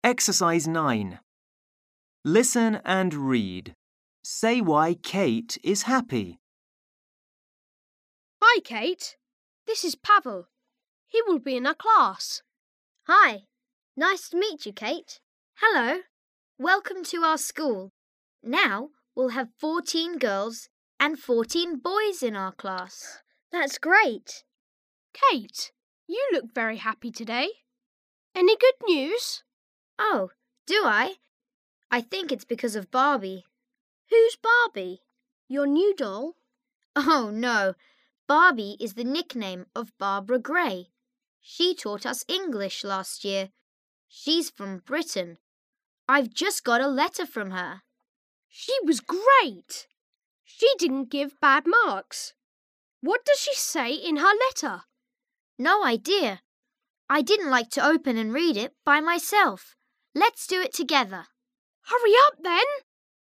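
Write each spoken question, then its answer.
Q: Say why Kate is happy.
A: Because she has just got a letter from Barbie (Barbara Gray), her former English teacher.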